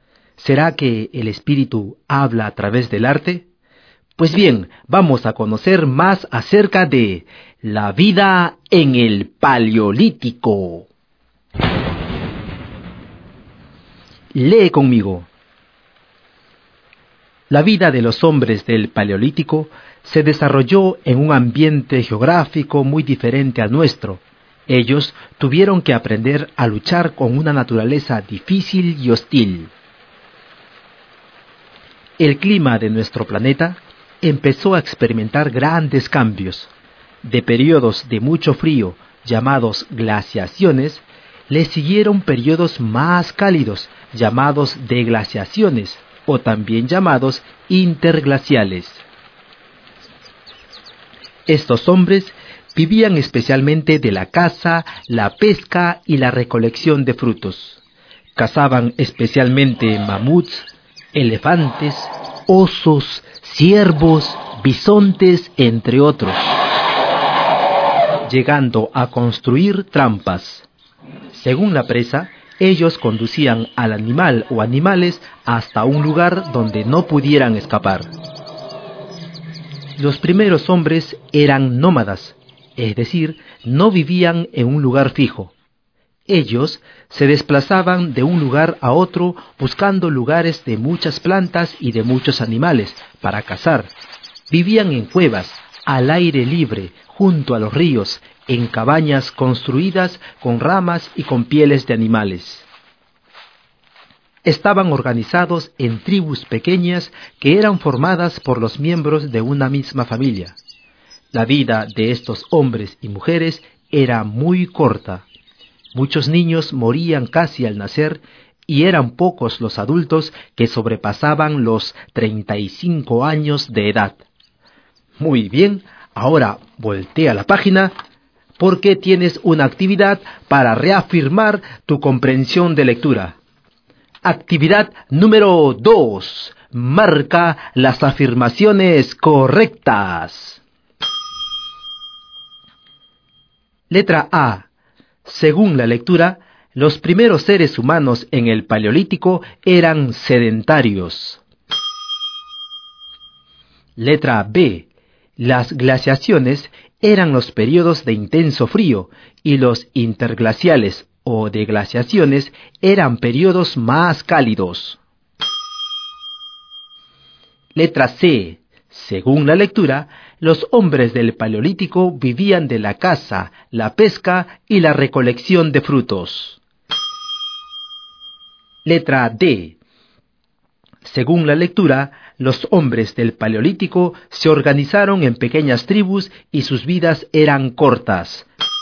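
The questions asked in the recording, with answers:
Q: Letra A. Según la lectura, los primeros seres humanos en el Paleolítico eran sedentarios.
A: Incorrecta (eran nómadas)

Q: Letra B. Las glaciaciones eran los periodos de intenso frío y los interglaciales o deglaciaciones eran periodos más cálidos.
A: Correcta

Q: Letra C. Según la lectura, los hombres del Paleolítico vivían de la caza, la pesca y la recolección de frutos.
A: Correcta

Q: Letra D. Según la lectura, los hombres del Paleolítico se organizaron en pequeñas tribus y sus vidas eran cortas.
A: Correcta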